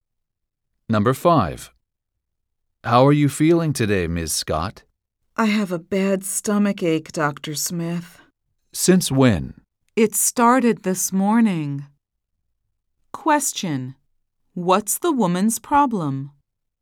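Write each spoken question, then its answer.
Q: What's the woman's problem?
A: She has a bad stomach ache.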